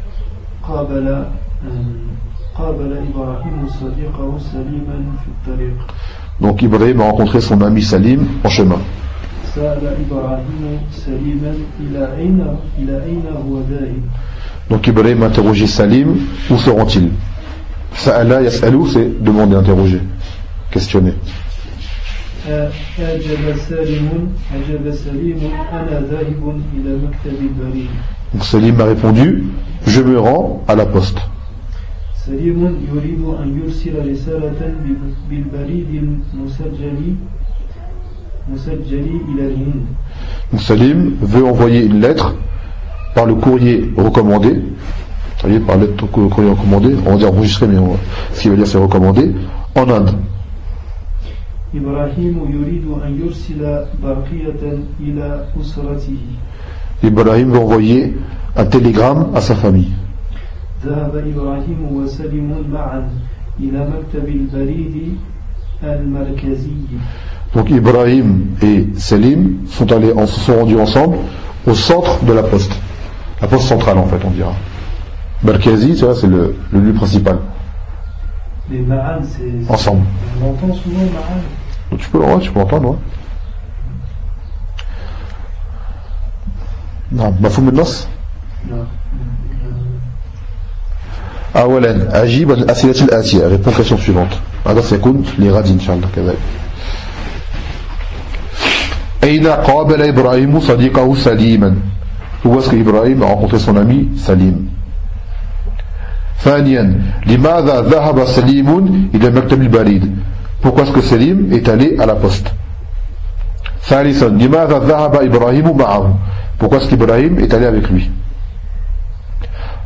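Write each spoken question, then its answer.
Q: Où est-ce qu'Ibrahim a rencontré son ami Salim ?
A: En chemin (dans la rue)

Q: Pourquoi est-ce que Salim est allé à la poste?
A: Pour envoyer une lettre en recommandé

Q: Pourquoi est-ce qu'Ibrahim est allé avec lui?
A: Pour envoyer un télégramme à sa famille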